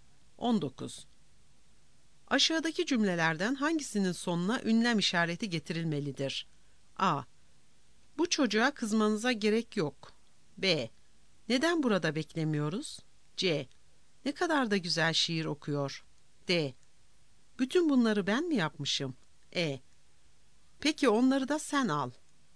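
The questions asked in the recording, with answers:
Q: Aşağıdaki cümlelerden hangisinin sonuna ünlem işareti getirilmelidir?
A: C: Ne kadar da güzel şiir okuyor.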